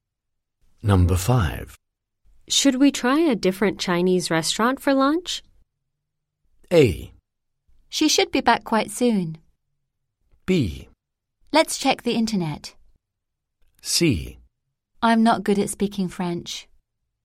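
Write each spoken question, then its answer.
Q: Should we try a different Chinese restaurant for lunch?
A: B: Let's check the internet.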